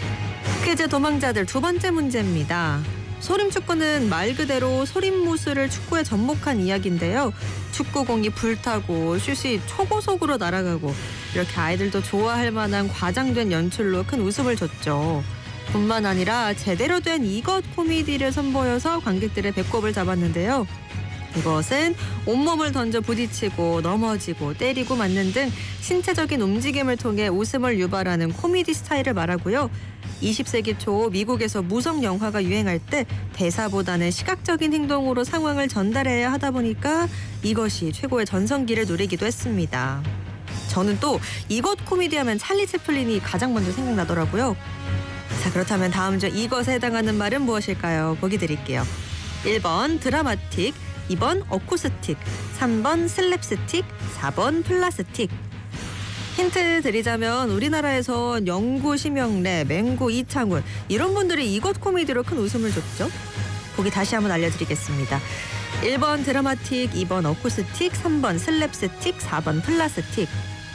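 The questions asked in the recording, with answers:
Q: 자, 그렇다면 다음 중 이것에 해당하는 말은 무엇일까요?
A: 3: 슬랩스틱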